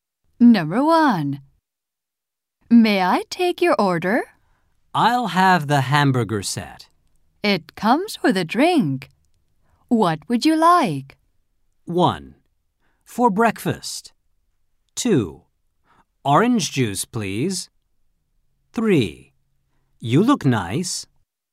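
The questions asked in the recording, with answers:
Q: It comes with a drink. What would you like?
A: 2: Orange juice, please.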